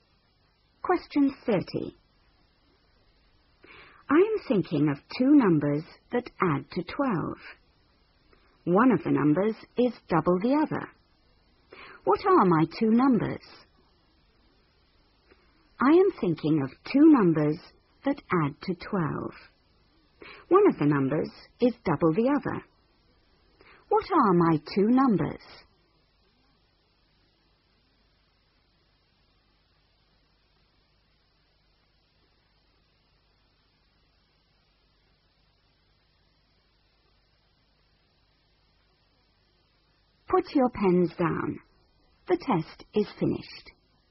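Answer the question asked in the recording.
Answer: 4 and 8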